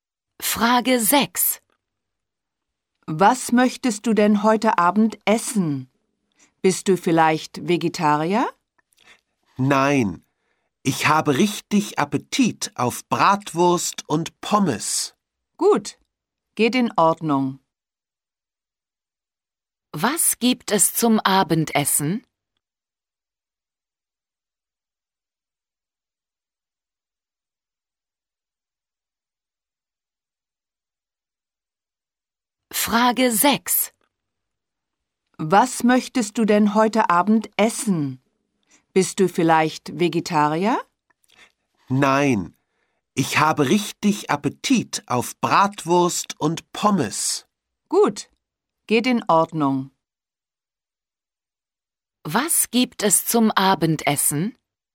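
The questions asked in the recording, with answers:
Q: Was gibt es zum Abendessen?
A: Bratwurst und Pommes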